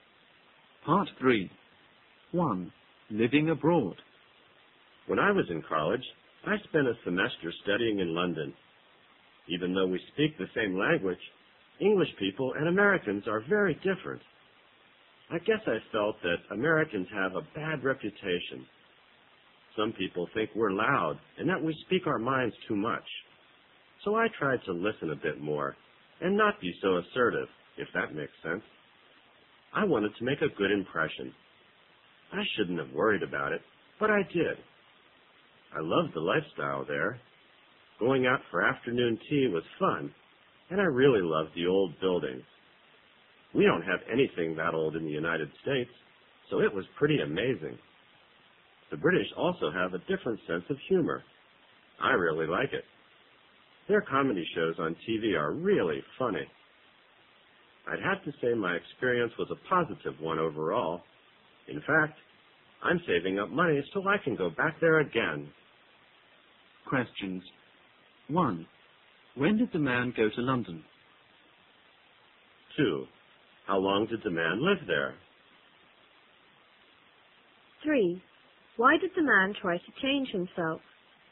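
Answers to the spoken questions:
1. When he was in college
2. A semester
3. Americans have a bad reputation and he wanted to make a good impression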